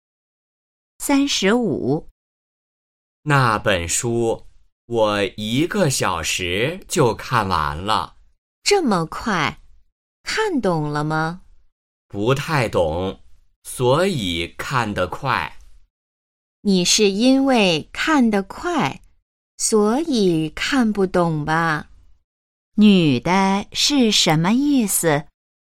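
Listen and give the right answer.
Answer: 她认为男的是因为看得太快,所以才没看懂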